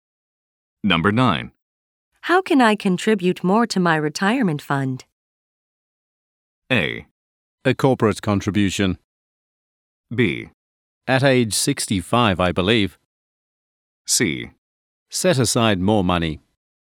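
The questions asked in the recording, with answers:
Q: How can I contribute more to my retirement fund?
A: C: Set aside more money.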